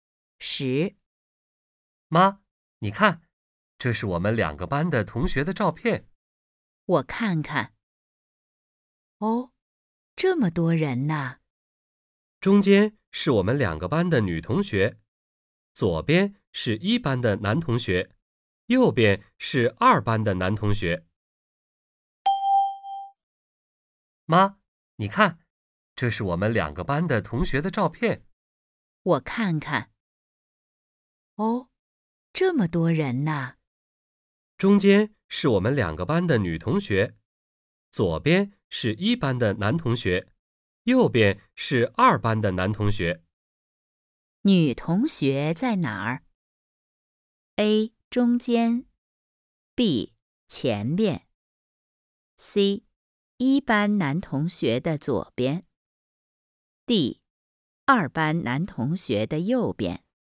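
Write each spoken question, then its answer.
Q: 女同学在哪儿?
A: A: 中间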